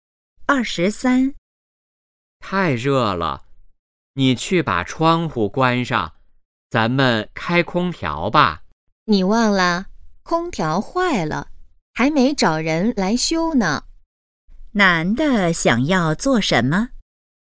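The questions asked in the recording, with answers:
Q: 男的想要做什么?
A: 开空调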